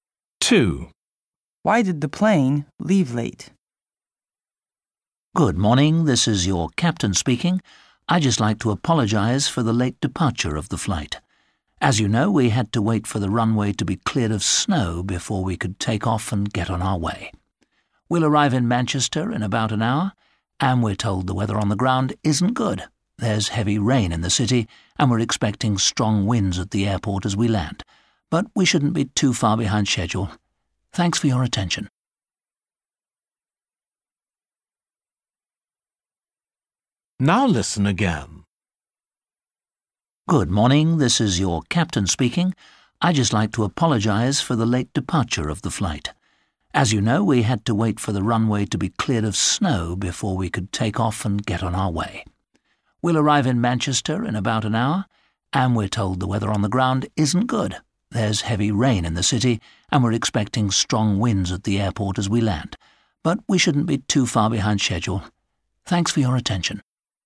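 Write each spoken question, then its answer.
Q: Why did the plane leave late?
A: the runway had to be cleared of snow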